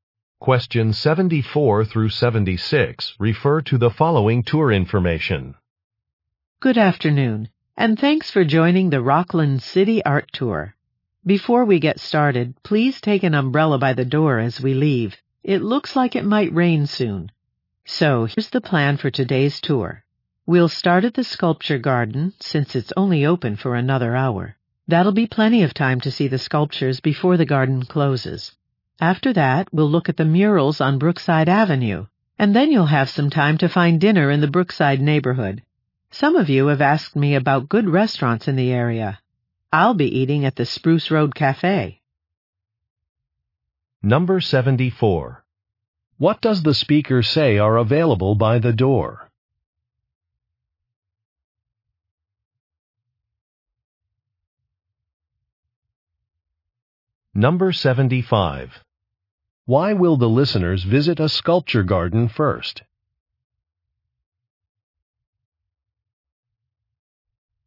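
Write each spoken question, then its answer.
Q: What does the speaker say are available by the door?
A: Umbrellas

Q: Why will the listeners visit a sculpture garden first?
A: It will close in an hour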